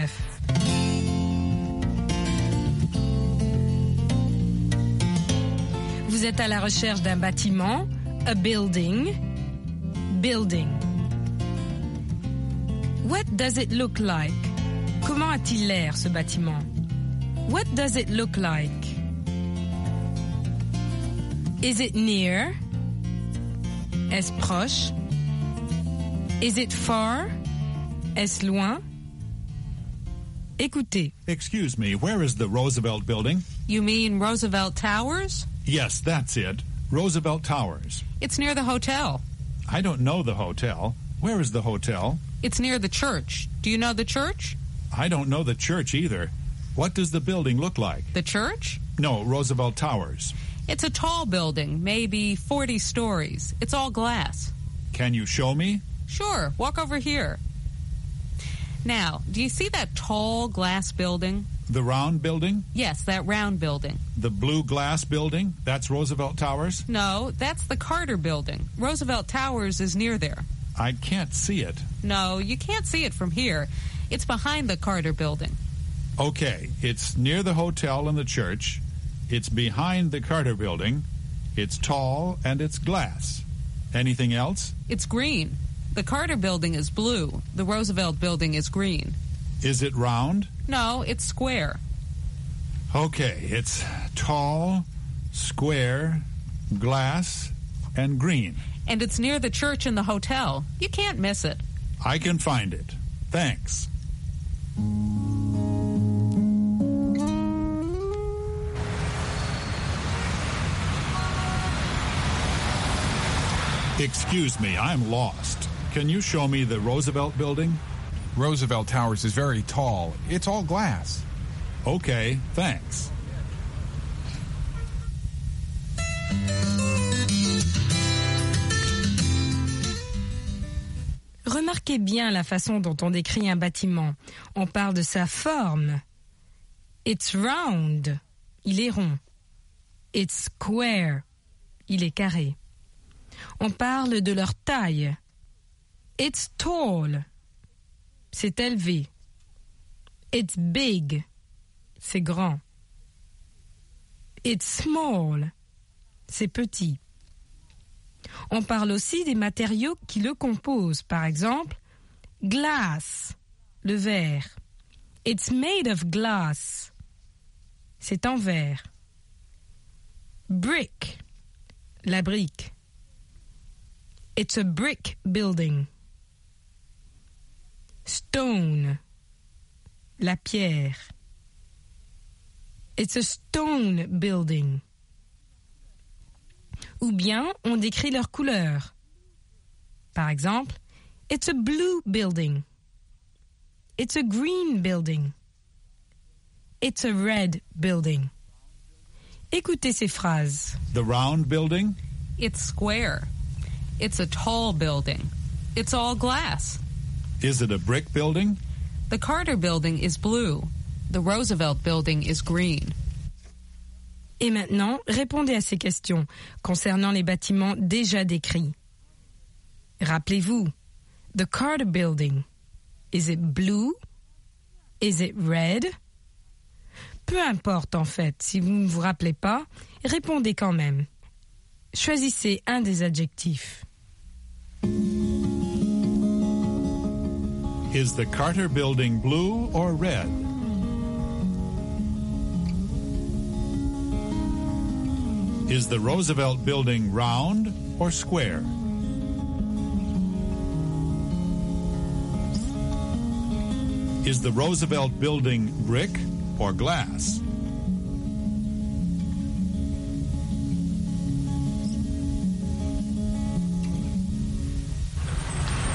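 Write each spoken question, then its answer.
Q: Is the Carter Building blue or red?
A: Blue

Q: Is the Roosevelt Building round or square?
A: Square

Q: Is the Roosevelt Building brick or glass?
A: Glass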